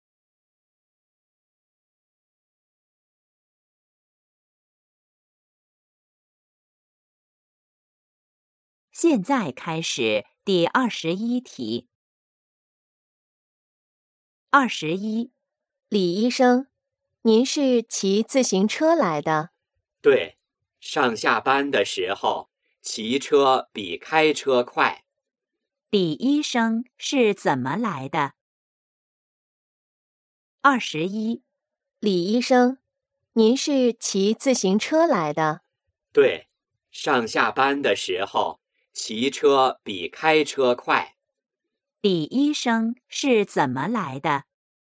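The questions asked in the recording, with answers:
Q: 李医生是怎么来的?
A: 骑自行车来的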